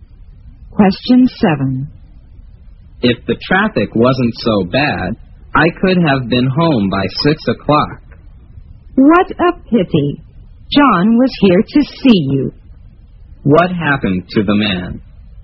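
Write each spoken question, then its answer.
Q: What happened to the man?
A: He was held up by heavy traffic and got home late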